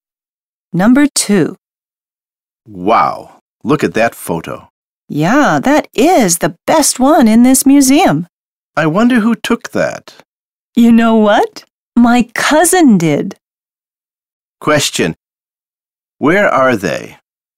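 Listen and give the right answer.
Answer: In a museum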